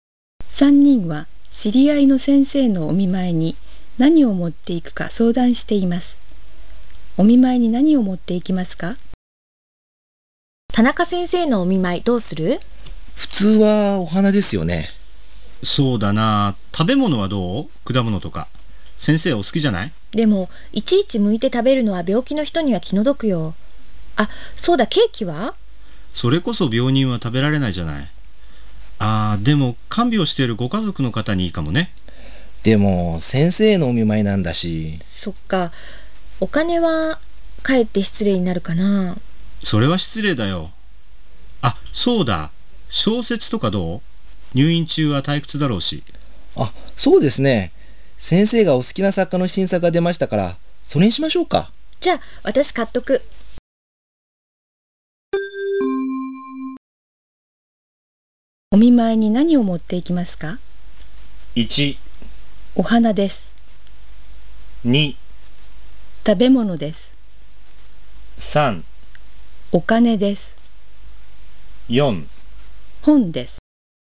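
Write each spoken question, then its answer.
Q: お見舞いに何を持っていきますか?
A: 4: 本です。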